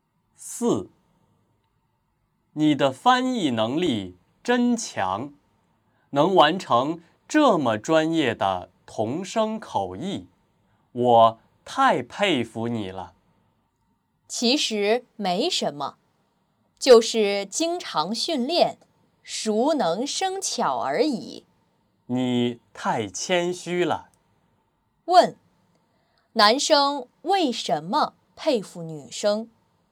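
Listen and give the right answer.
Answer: 女生翻译能力很强,能完成很专业的同声口译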